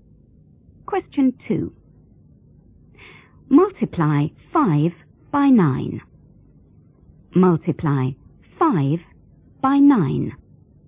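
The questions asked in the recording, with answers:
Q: Multiply 5 by 9.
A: 45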